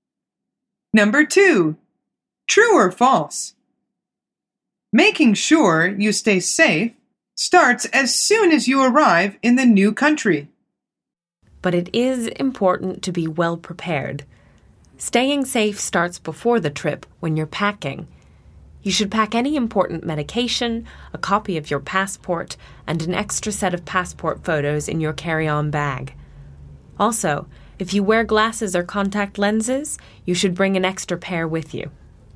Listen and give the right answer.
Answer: The answer is false. She says, staying safe starts before the trip, when you're packing.